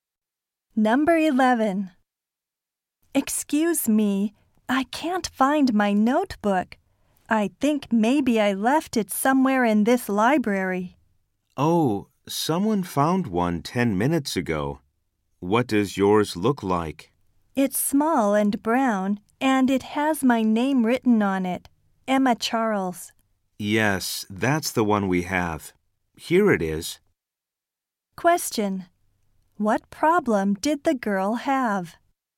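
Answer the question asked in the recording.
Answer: She lost her notebook.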